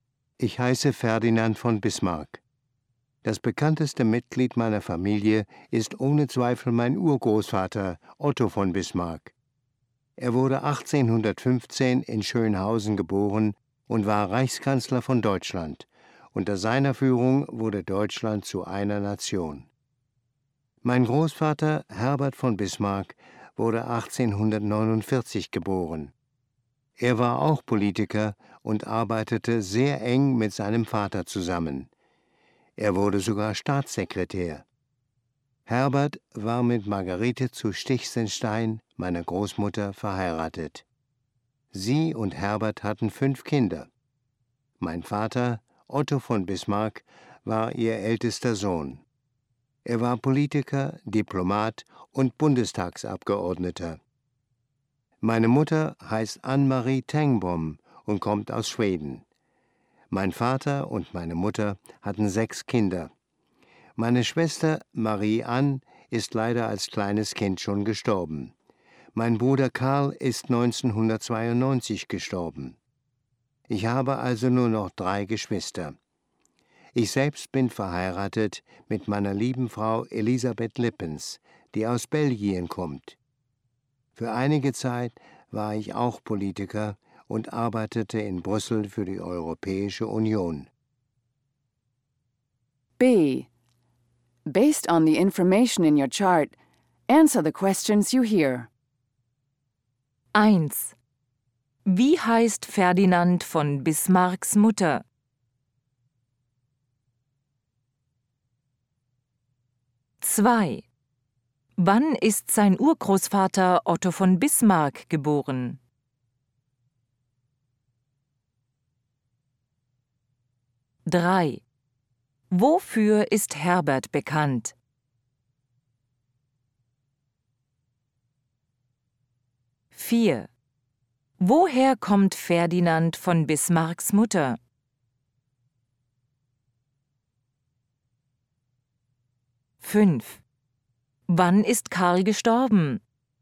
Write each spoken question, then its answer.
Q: Wie heißt Ferdinand von Bismarcks Mutter?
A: Ann-Marie.

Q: Wann ist sein Urgroßvater Otto von Bismarck geboren?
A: 1815.

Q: Wofür ist Herbert bekannt?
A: Er war Staatssekretär.

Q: Woher kommt Ferdinand von Bismarcks Mutter?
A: Aus Schweden.

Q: Wann ist Karl gestorben?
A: 1992.